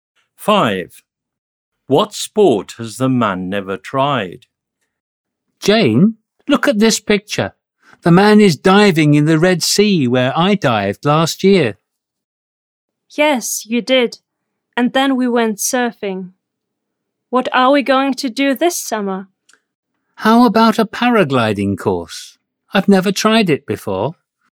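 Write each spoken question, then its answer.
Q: What sport has the man never tried?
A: Paragliding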